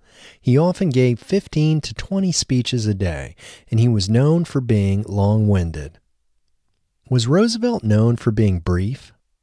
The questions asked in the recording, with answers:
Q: Was Roosevelt known for being brief?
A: No, Roosevelt wasn't known for being brief.